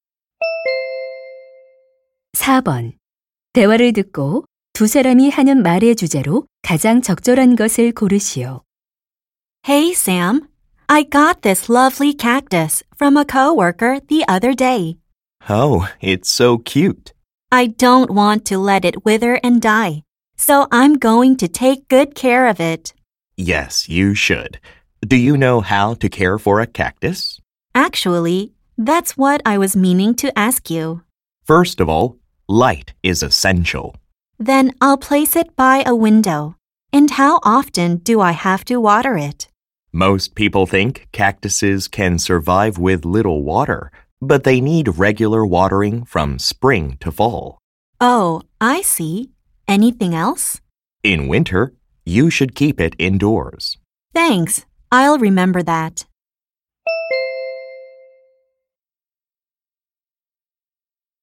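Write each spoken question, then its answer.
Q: 대화를 듣고 두 사람이 하는 말의 주제로 가장 적절한 것을 고르시오.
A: 선인장 키우는 방법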